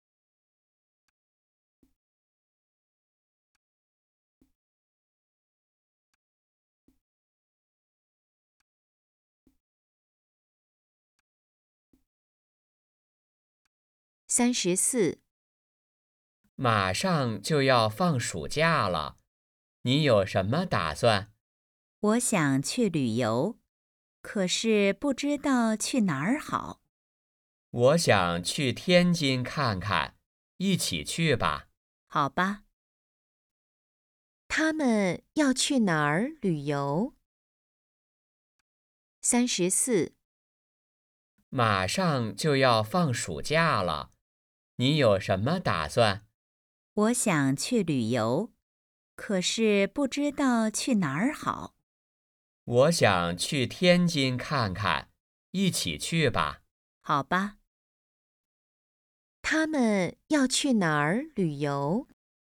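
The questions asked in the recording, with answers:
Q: 他们要去哪儿旅游?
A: 天津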